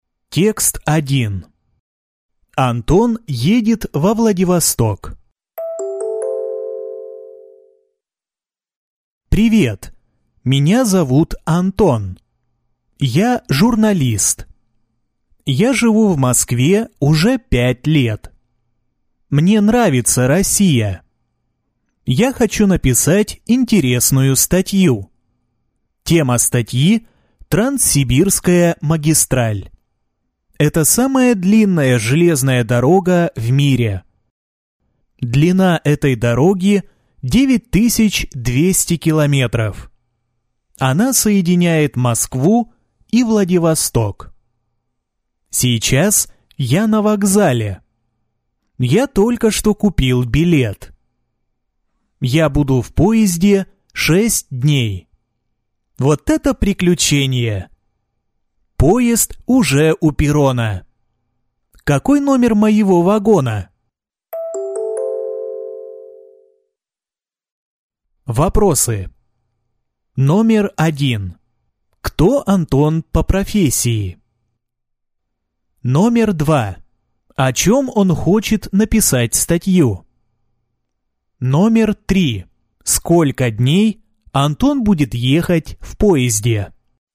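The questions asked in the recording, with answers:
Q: Кто Антон по профессии?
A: Журналист

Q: О чем он хочет написать статью?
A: О Транссибирской магистрали

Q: Сколько дней Антон будет ехать в поезде?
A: 6 дней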